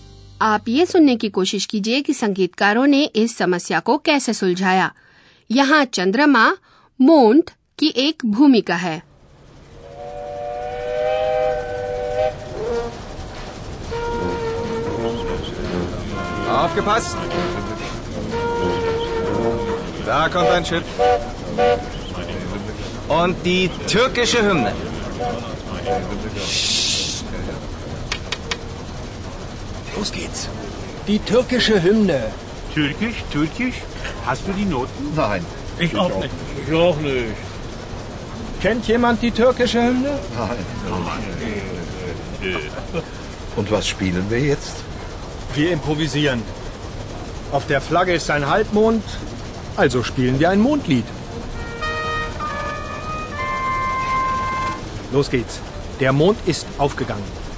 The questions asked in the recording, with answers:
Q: आप ये सुनने की कोशिश कीजिए कि संगीतकारों ने इस समस्या को कैसे सुलझाया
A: आप समझ गए होंगे कि संगीतकारों ने काम चलाओ इंतजाम कर लिया